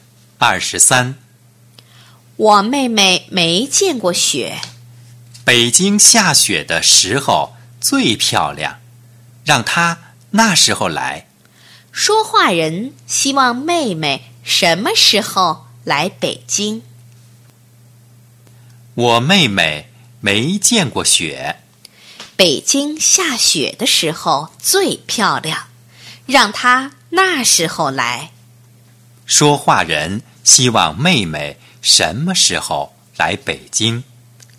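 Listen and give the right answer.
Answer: 北京下雪的时候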